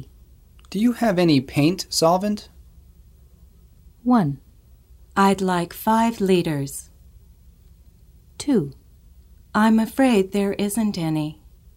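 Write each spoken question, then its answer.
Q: Do you have any paint solvent?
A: 2: I'm afraid there isn't any.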